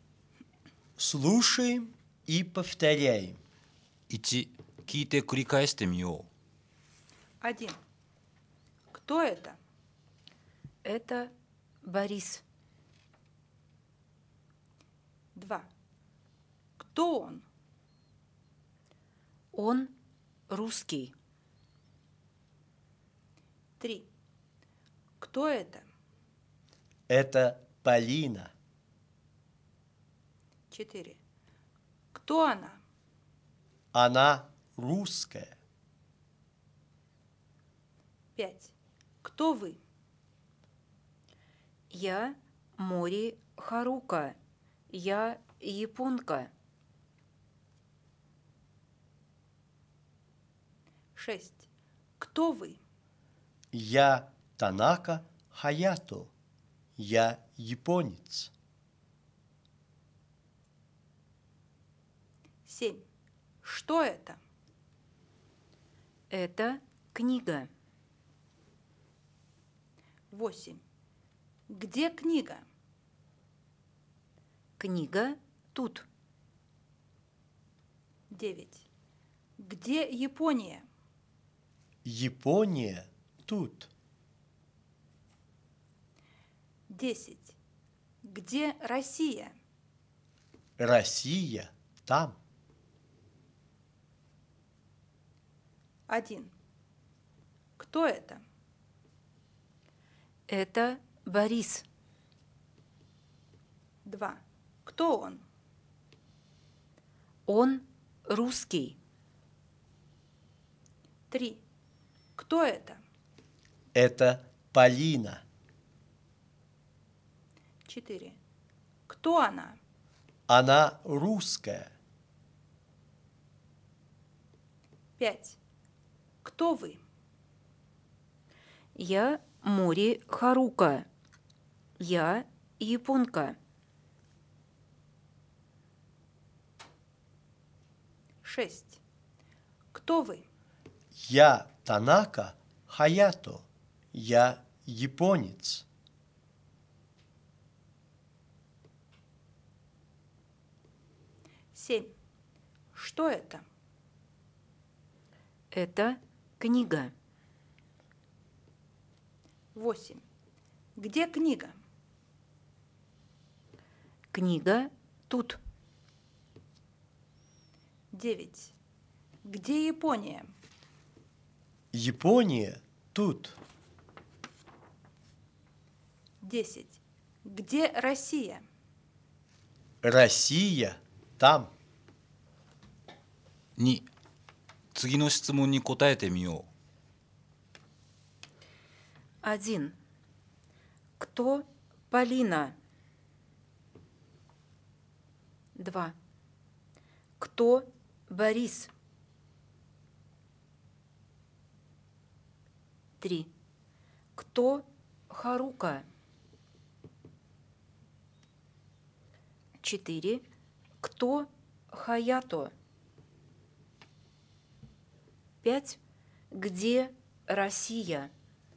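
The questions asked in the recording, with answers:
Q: Кто Полина?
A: Она русская.

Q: Кто Борис?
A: Он русский.

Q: Кто Харука?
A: Она японка.

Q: Кто Хаято?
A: Он японец.

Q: Где Россия?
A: Россия там.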